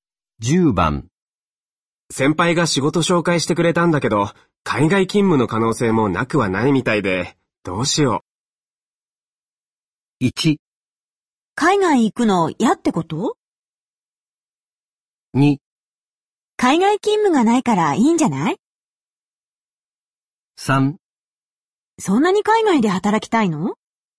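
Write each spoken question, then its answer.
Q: 先輩が仕事紹介してくれたんだけど、海外勤務の可能性もなくはないみたいで、どうしよう。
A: 1: 海外行くの嫌ってこと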